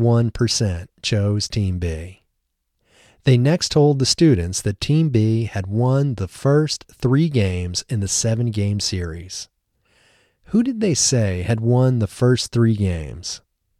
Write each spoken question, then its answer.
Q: Who did they say had won the first 3 games?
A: They said Team B had won the first 3 games.